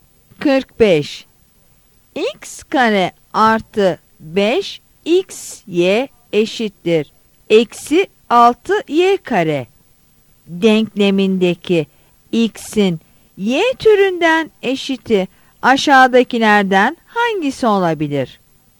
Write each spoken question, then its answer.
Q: X kare artı 5xy eşittir eksi 6y kare denklemindeki x'in y türünden eşiti aşağıdakilerden hangisi olabilir?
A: Yanıt D'dir.